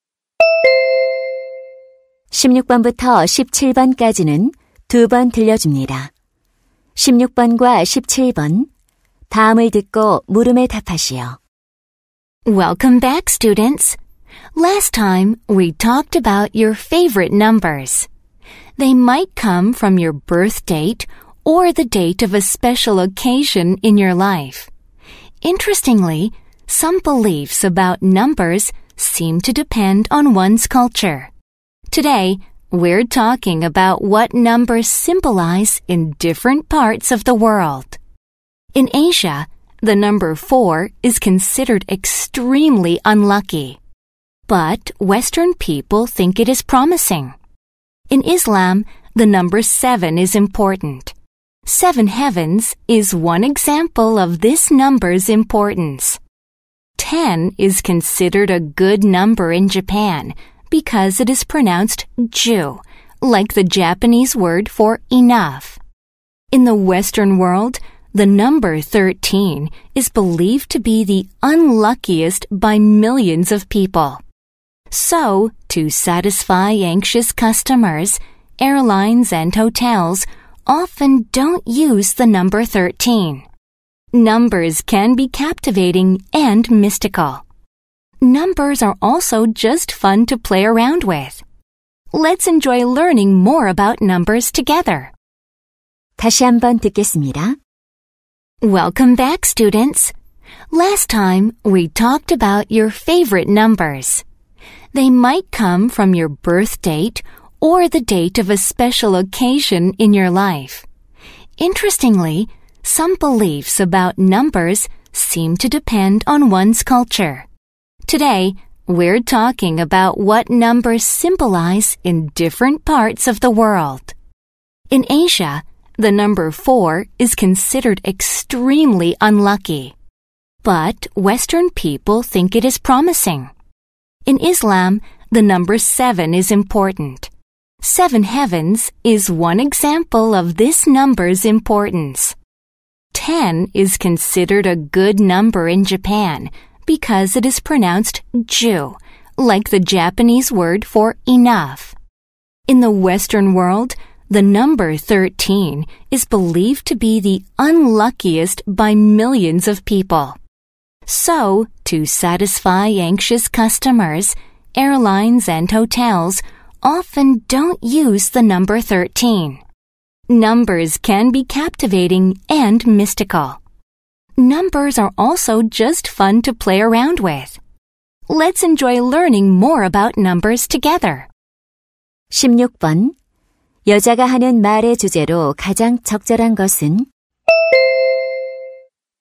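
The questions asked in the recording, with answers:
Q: 여자가 하는 말의 주제로 가장 적절한 것은?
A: 문화권에 따라 숫자가 상징하는 의미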